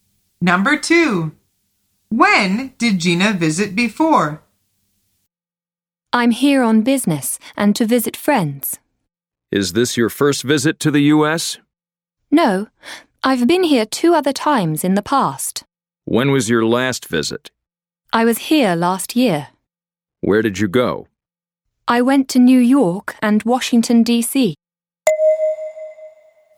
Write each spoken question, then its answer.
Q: When did Gina visit before?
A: The answer is last year.